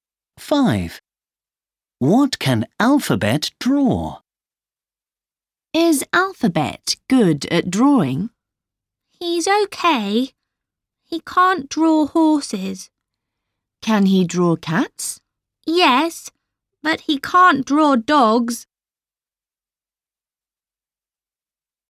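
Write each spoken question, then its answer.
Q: What can Alphabet draw?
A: Cats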